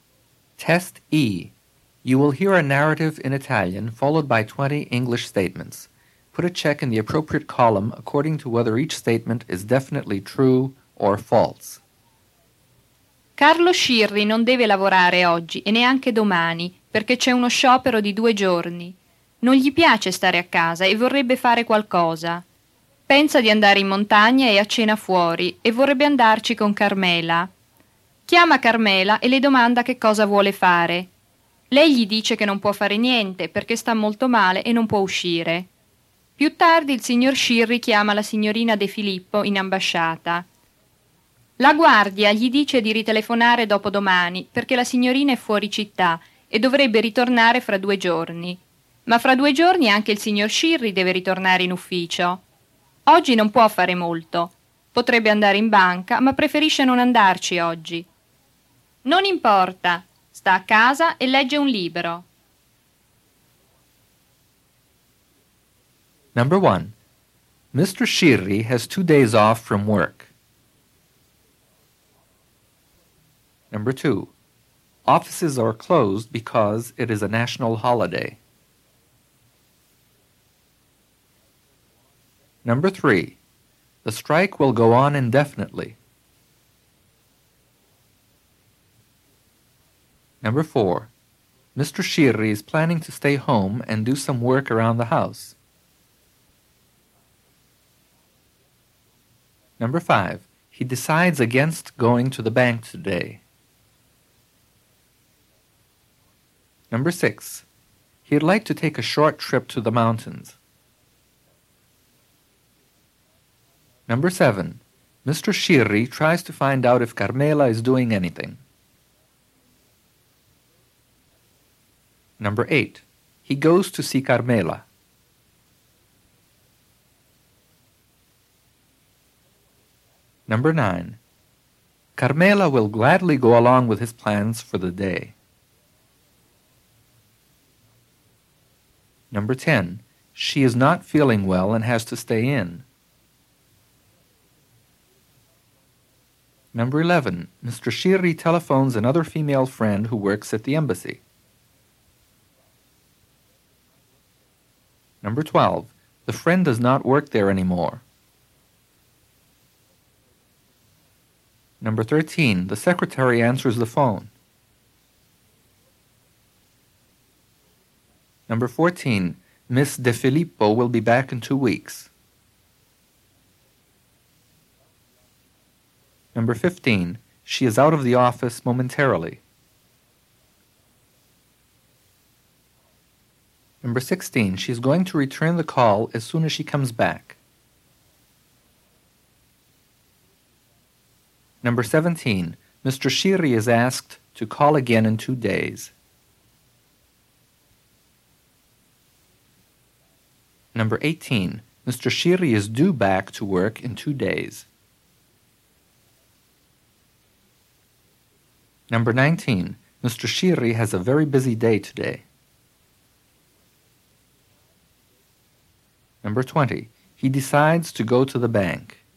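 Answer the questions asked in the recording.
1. True
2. False
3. False
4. False
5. True
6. True
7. True
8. False
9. False
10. True
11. True
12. False
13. False
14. False
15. False
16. False
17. True
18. True
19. False
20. False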